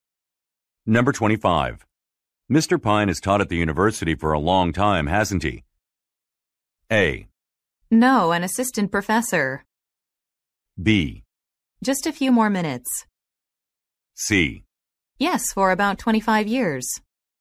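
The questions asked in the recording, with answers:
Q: Mr. Pine has taught at the university for a long time, hasn't he?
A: C: Yes, for about 25 years.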